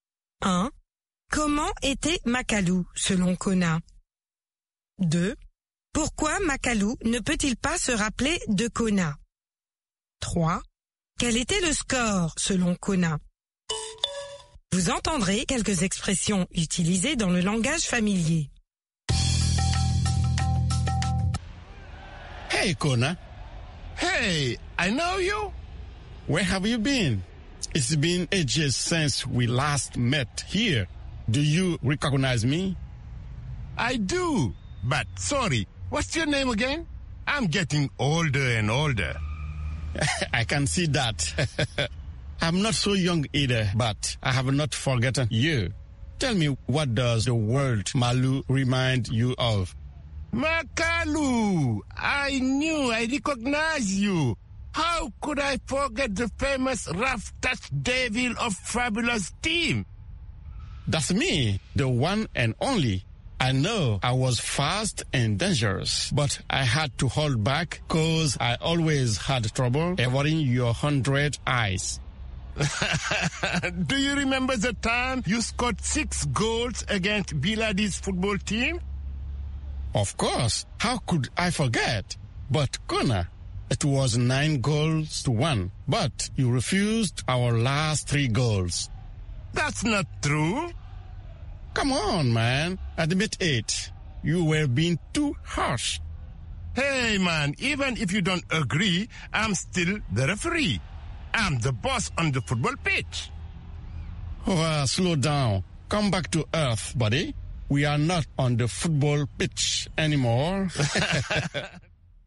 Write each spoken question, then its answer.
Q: Pourquoi Makalu ne peut-il pas se rappeler de Kona?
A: Parce qu'il devient de plus en plus vieux.